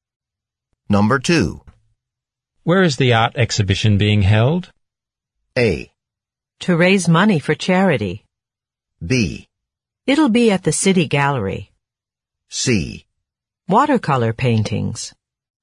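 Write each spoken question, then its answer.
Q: Where is the art exhibition being held?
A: B: It'll be at the City Gallery.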